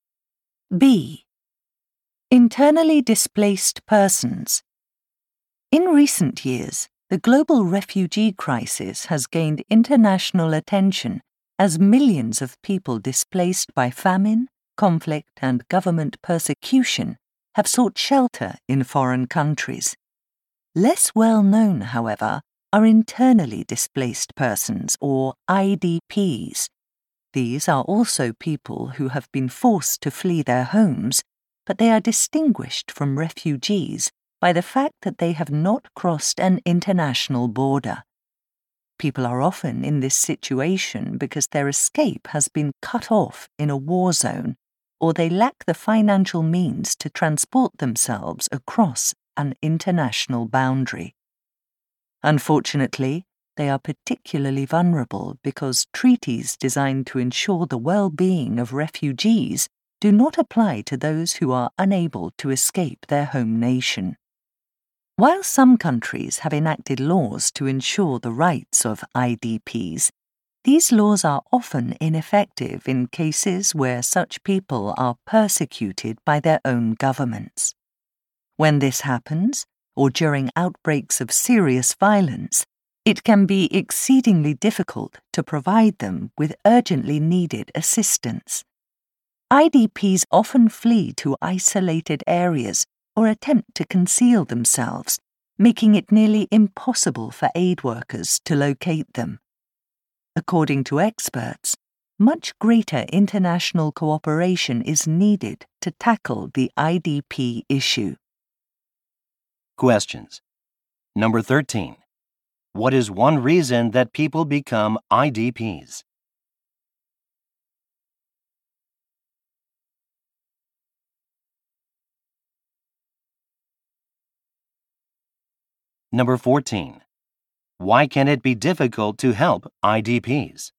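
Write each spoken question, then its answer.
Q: What is one reason that people become IDPs?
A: They can't afford to travel across an international border, or their escape is cut off in a war zone

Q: Why can it be difficult to help IDPs?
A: They often flee to isolated areas or hide, so aid workers can't find them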